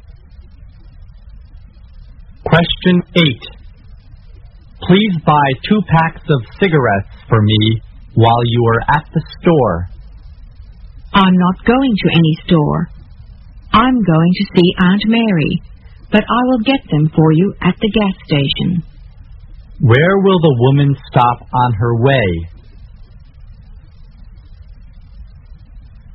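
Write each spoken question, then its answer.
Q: Where will the woman stop on her way?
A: At the gas station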